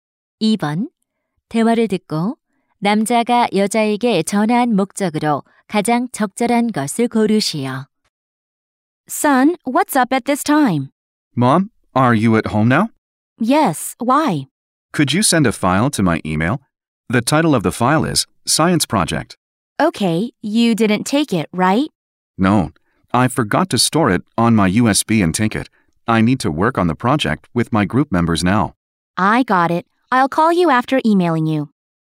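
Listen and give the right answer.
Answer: 이메일로 파일을 보내 달라고 부탁하려고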